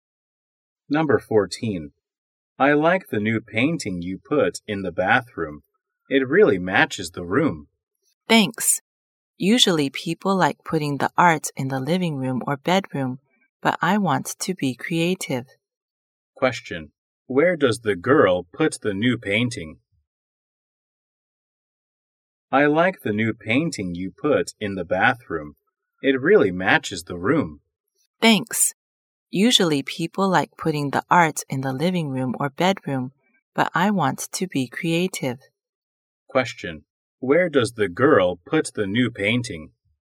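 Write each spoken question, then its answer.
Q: where does the girl put the new painting?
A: In the bathroom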